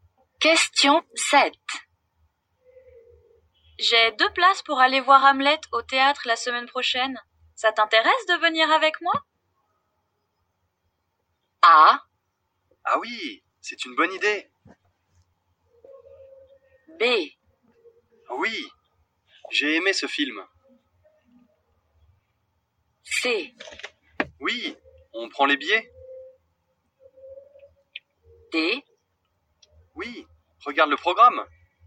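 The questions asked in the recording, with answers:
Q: Ça t'intéresse de venir avec moi?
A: A: Ah oui, c'est une bonne idée.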